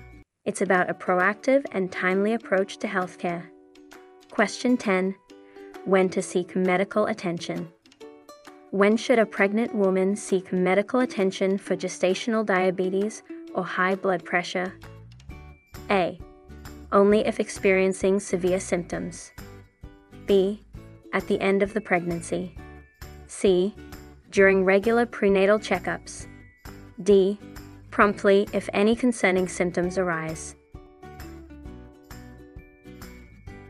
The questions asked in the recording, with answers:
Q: When should a pregnant woman seek medical attention for gestational diabetes or high blood pressure?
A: The correct answer is D. Promptly if any concerning symptoms arise.